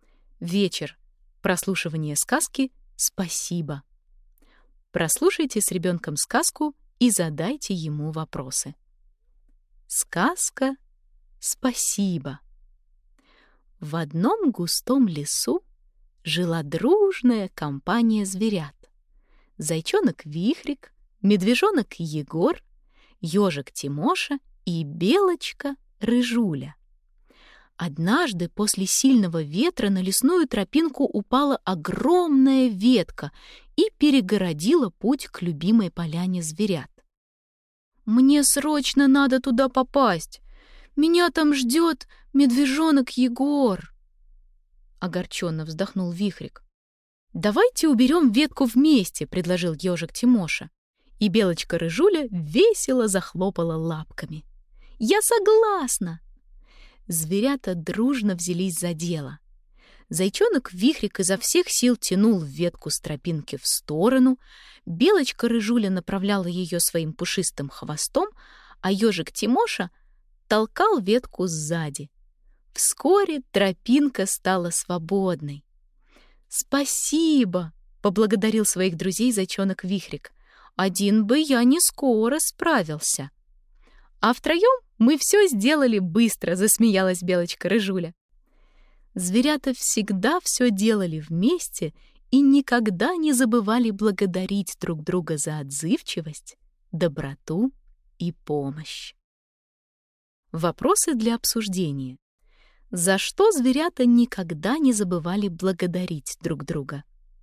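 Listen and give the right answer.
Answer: За отзывчивость, доброту и помощь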